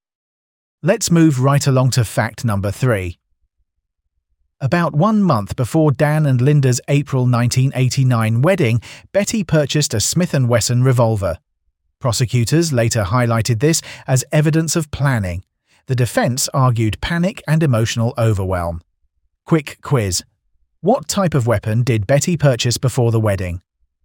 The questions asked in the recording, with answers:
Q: What type of weapon did Betty purchase before the wedding?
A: a revolver.